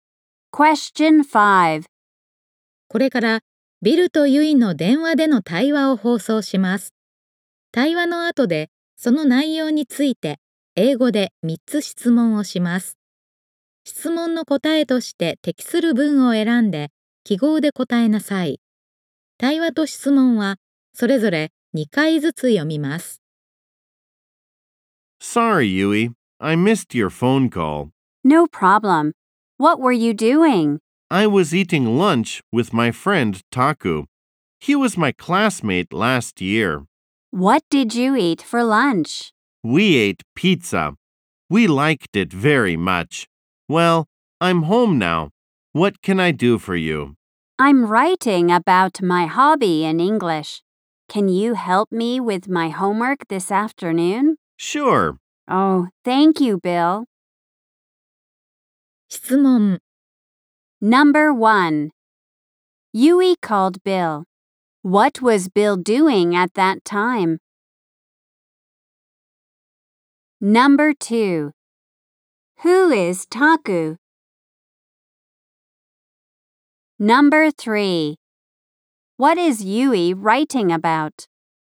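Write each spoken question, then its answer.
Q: Yui called Bill. What was Bill doing at that time?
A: He was eating lunch with his friend Taku.

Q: Who is Taku?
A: Bill's friend, who was his classmate last year.

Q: What is Yui writing about?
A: Her hobby.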